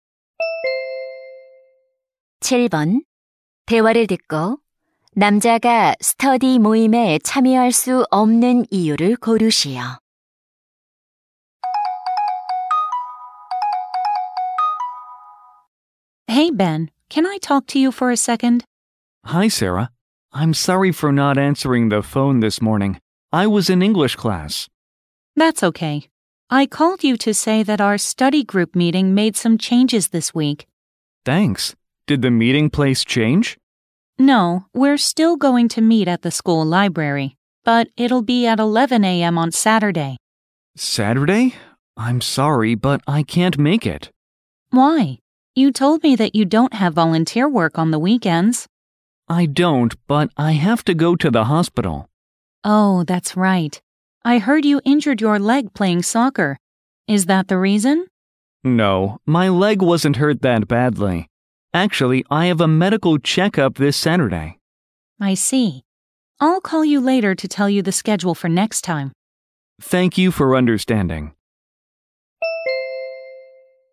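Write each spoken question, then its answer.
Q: 대화를 듣고 남자가 스터디 모임에 참여할 수 없는 이유를 고르시오.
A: 건강 검진을 받아야 해서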